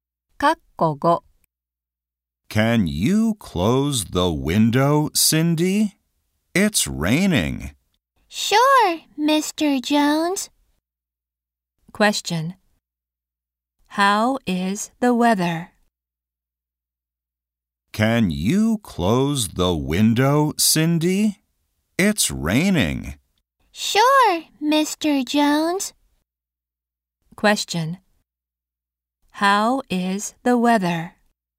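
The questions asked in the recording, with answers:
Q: How is the weather?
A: It's raining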